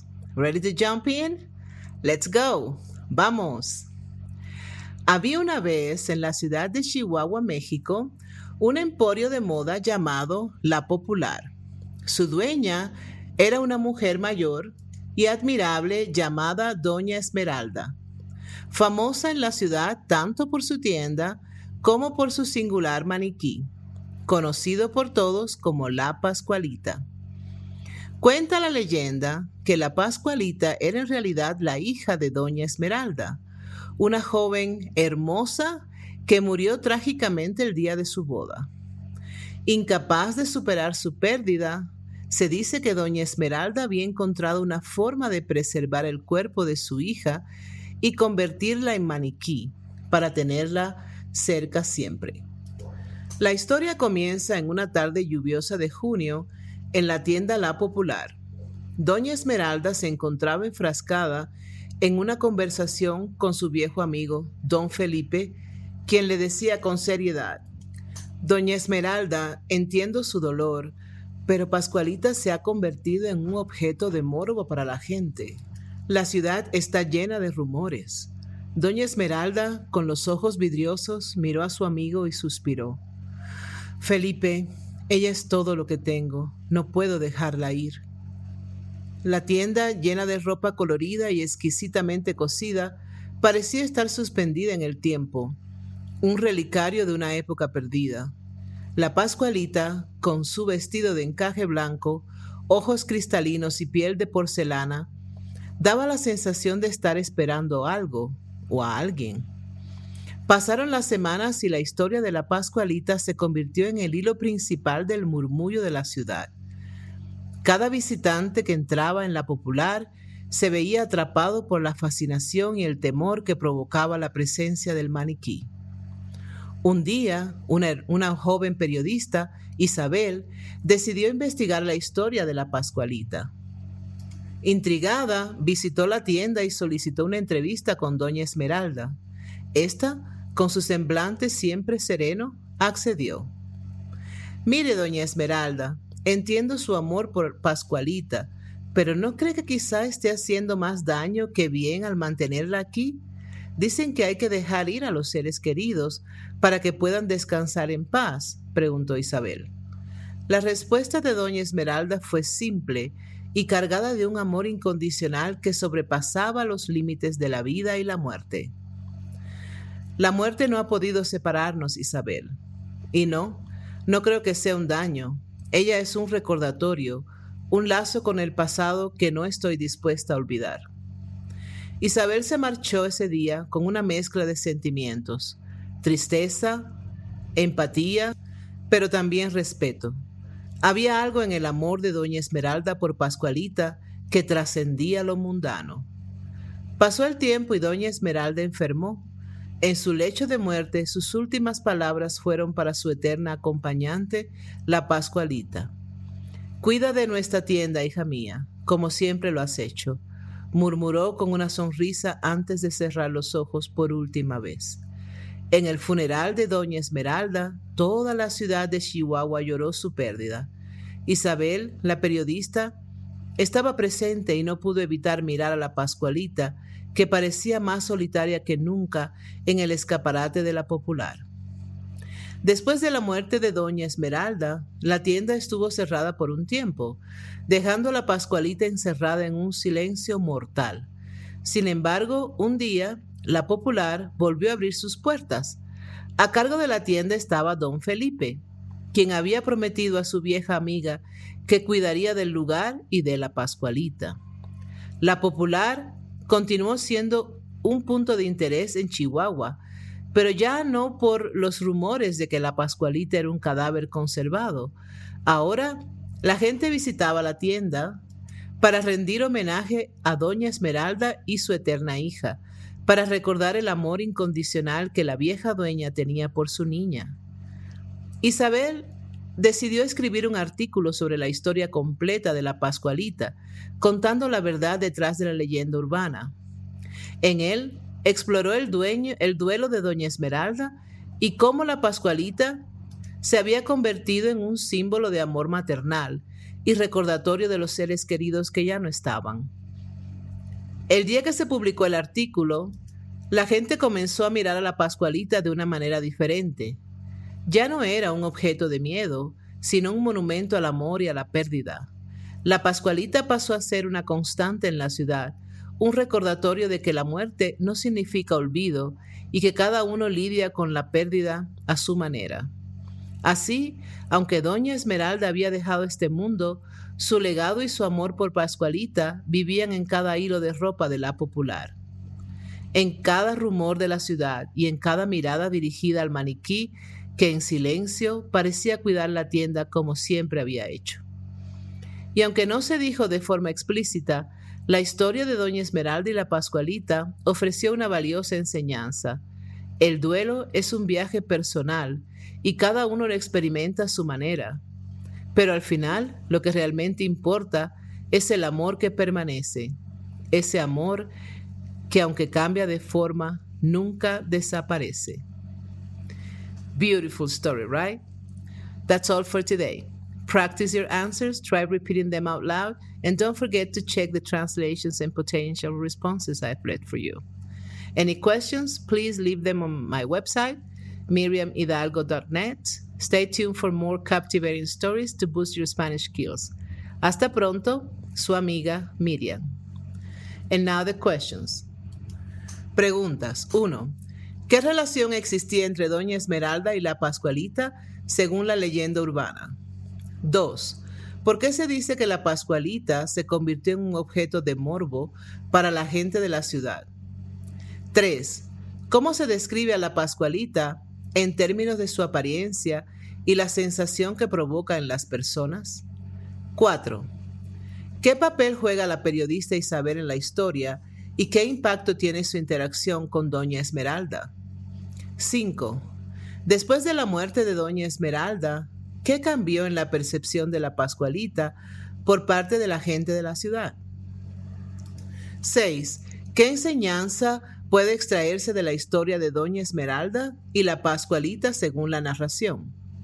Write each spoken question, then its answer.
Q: ¿Qué relación existía entre Doña Esmeralda y la Pascualita según la leyenda urbana?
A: Según la leyenda urbana, la Pascualita era la hija de Doña Esmeralda, que había sido preservada como maniquí después de su muerte.

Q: ¿Por qué se dice que la Pascualita se convirtió en un objeto de morbo para la gente de la ciudad?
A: La Pascualita se convirtió en un objeto de morbo debido a los rumores de que era el cadáver conservado de la hija de Doña Esmeralda.

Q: ¿Cómo se describe a la Pascualita en términos de su apariencia y la sensación que provoca en las personas?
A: La Pascualita es descrita como una figura con piel de porcelana, ojos cristalinos y un vestido de encaje blanco.

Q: ¿Qué papel juega la periodista Isabel en la historia y qué impacto tiene su interacción con Doña Esmeralda?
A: Isabel es una periodista que decide investigar la historia de la Pascualita.

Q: Después de la muerte de Doña Esmeralda, ¿qué cambió en la percepción de la Pascualita por parte de la gente de la ciudad?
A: Después de la muerte de Doña Esmeralda, la gente comenzó a ver a la Pascualita como un símbolo de amor y pérdida y un recordatorio de los seres queridos que ya no están.

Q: ¿Qué enseñanza puede extraerse de la historia de Doña Esmeralda y la Pascualita según la narración.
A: La enseñanza de la historia es que el duelo es un viaje personal y cada uno lo experimenta a su manera.